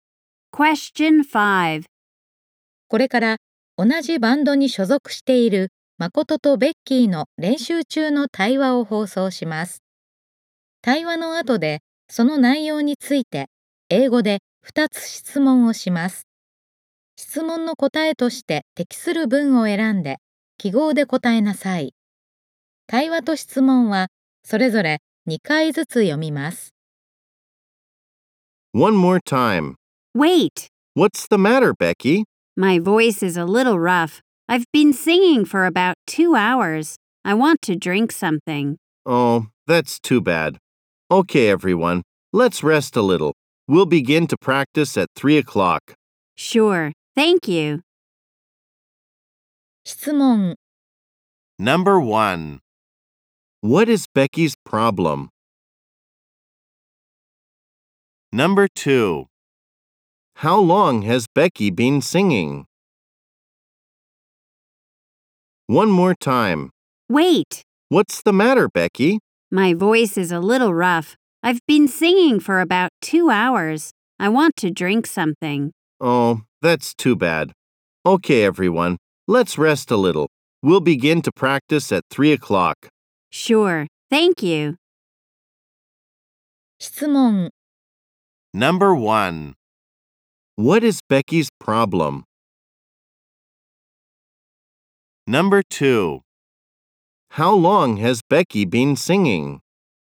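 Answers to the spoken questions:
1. Her voice is a little rough.
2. For about two hours.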